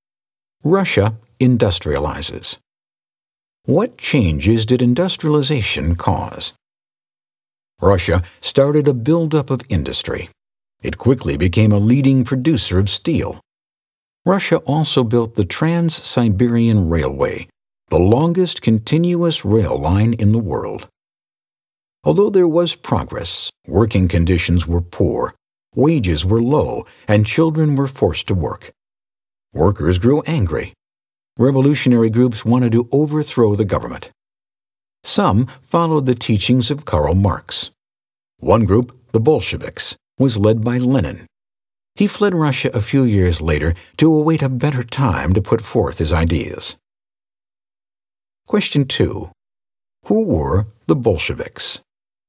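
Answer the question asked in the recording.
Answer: A revolutionary group led by Lenin that followed Marx's teachings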